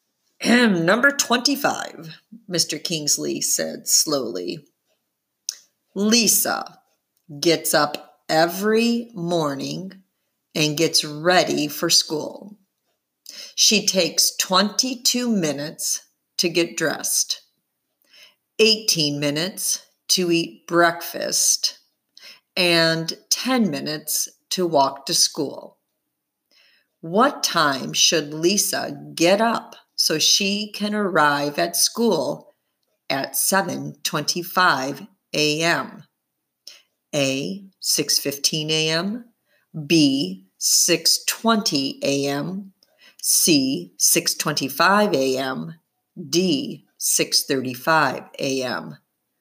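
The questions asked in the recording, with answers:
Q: What time should Lisa get up so she can arrive at school at 7:25 a.m.?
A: D: 6:35 a.m.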